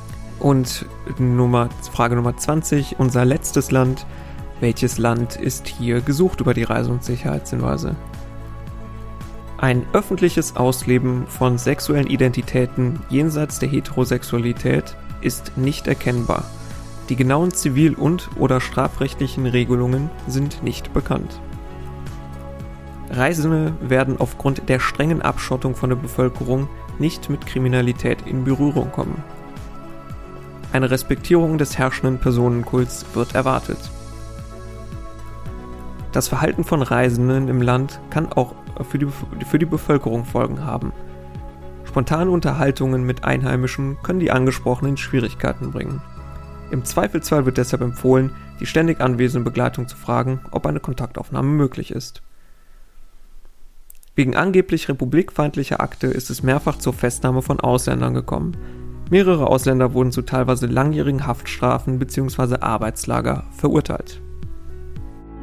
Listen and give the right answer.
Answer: Nordkorea war hier gesucht.